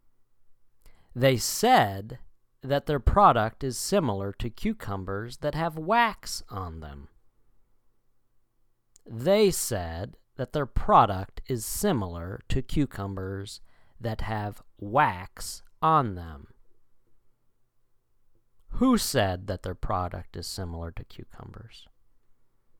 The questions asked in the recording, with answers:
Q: Who said that their product is similar to cucumbers?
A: The French fry industry.